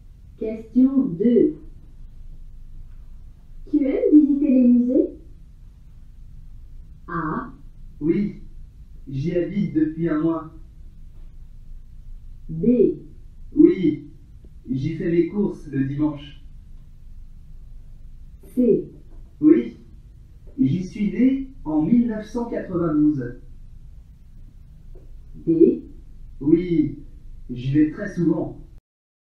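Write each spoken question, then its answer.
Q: Tu aimes visiter les musées?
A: D: Oui, j'y vais très souvent.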